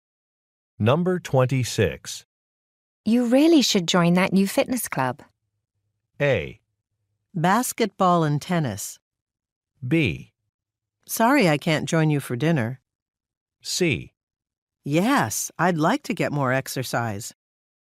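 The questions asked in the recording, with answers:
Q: You really should join that new fitness club.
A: C: Yes, I'd like to get more exercise.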